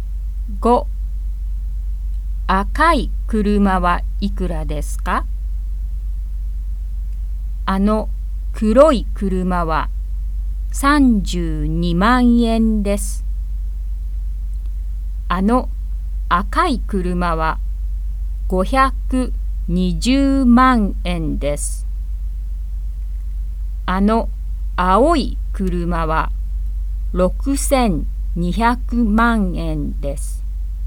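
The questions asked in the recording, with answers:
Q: 赤い車はいくらですか?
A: 520万円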